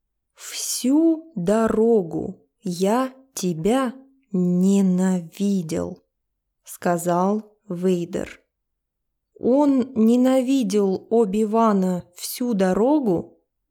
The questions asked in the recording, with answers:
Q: Он ненавидел Оби-Вана всю дорогу?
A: Да, всю дорогу он ненавидел своего учителя.